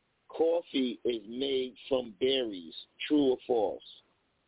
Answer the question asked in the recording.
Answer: Sorry, that one is true.